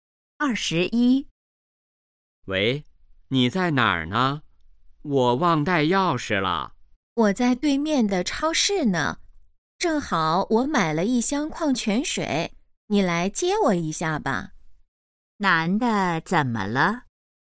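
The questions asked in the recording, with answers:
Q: 男的怎么了?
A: 忘带钥匙了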